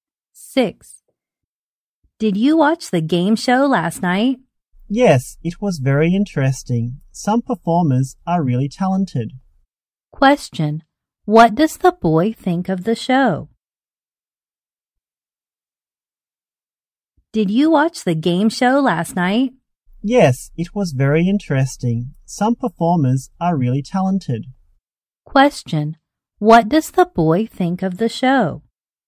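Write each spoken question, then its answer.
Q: What does the boy think of the show?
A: Very interesting; some performers are really talented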